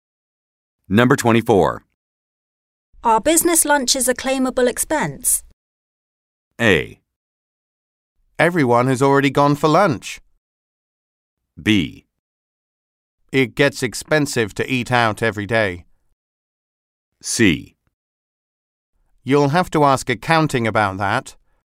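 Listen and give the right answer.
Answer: C: You'll have to ask accounting about that.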